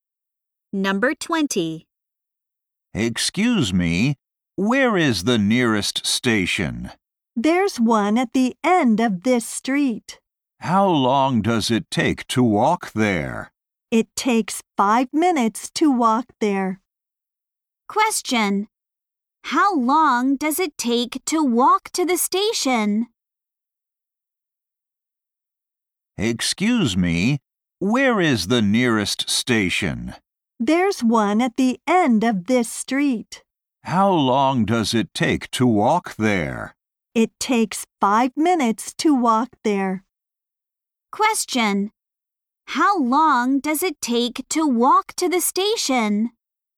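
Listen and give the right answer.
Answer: 5 minutes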